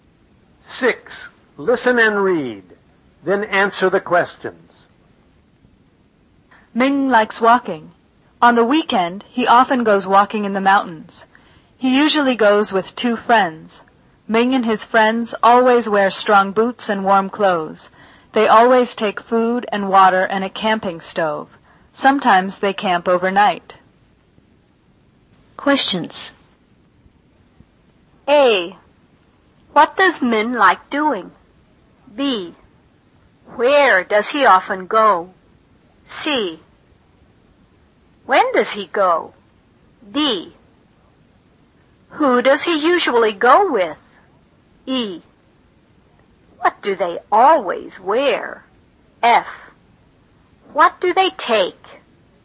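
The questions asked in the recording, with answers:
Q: What does Min like doing?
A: Walking

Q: Where does he often go?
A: Walking in the mountains

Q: When does he go?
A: On the weekend

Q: Who does he usually go with?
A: Two friends

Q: What do they always wear?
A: Strong boots and warm clothes

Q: What do they take?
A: Food, water and a camping stove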